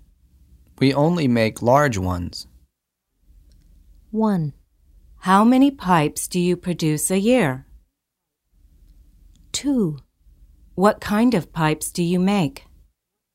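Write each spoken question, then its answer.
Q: We only make large ones.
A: 2: What kind of pipes do you make?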